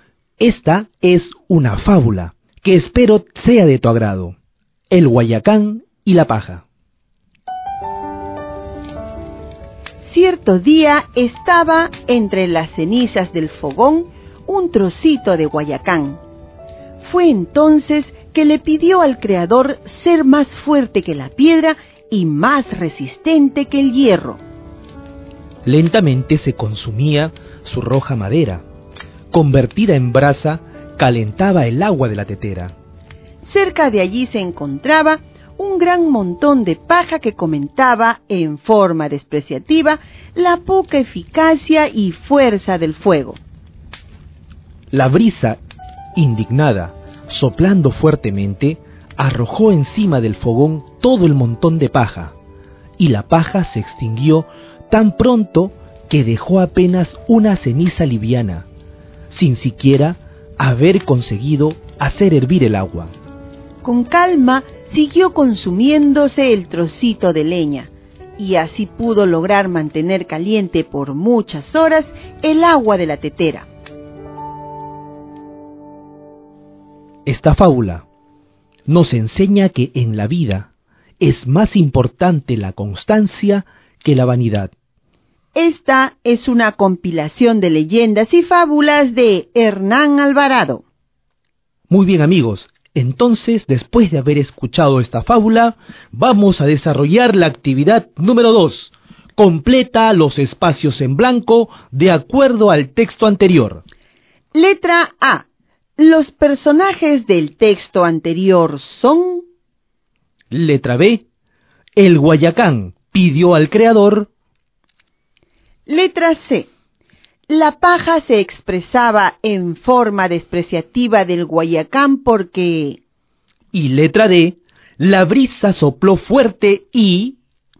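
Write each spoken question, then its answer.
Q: Los personajes del texto anterior son...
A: el guayacán, la paja y la brisa

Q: El guayacán pidió al creador...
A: ser más fuerte que la piedra y más resistente que el hierro

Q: la brisa sopló fuerte y...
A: arrojó todo el montón de paja encima del fogón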